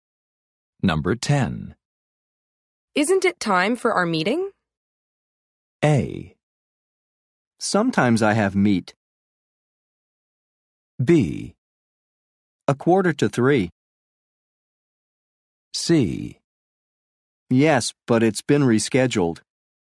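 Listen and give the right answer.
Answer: C: Yes, but it's been rescheduled.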